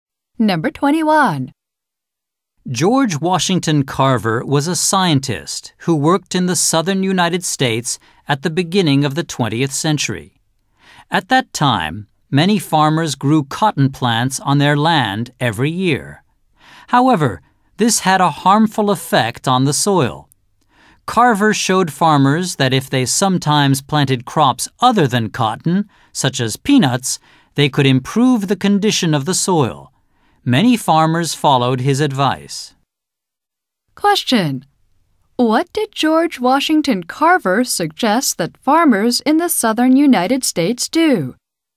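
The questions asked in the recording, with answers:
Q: What did George Washington Carver suggest that farmers in the southern United States do?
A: Sometimes plant crops other than cotton, such as peanuts, to improve the soil.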